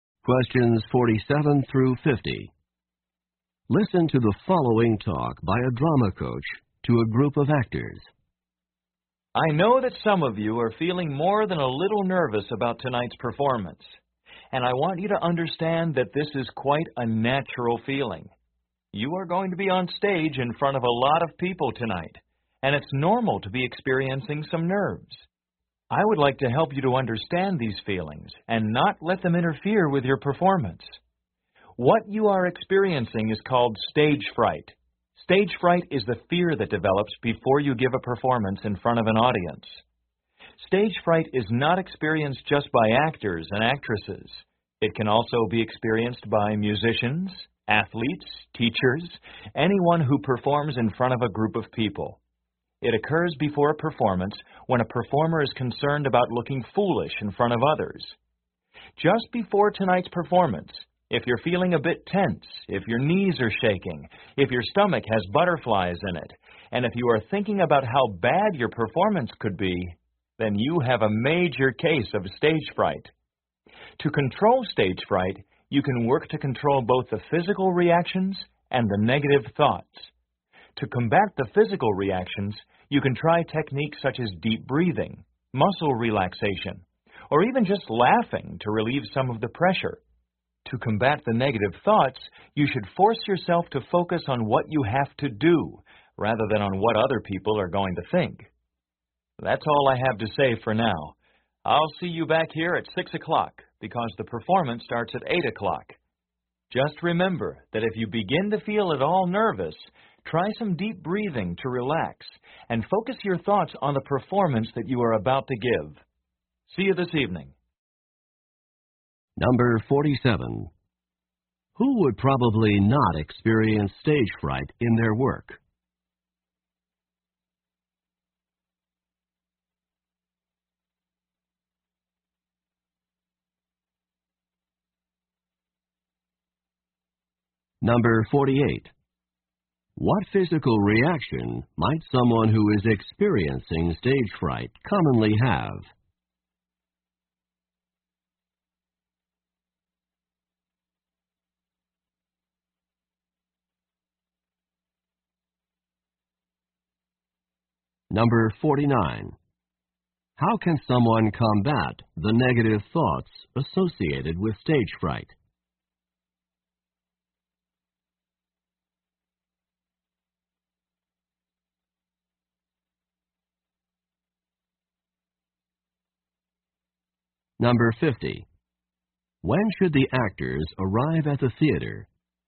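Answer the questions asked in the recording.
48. Shaking knees (tension, butterflies in the stomach)
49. By focusing on what they have to do rather than on what others will think
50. At 6 o'clock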